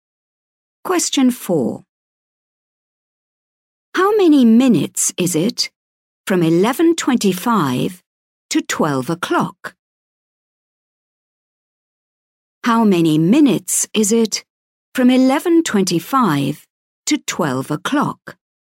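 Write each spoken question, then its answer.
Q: How many minutes is it from 11:25 to 12 o'clock?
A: 35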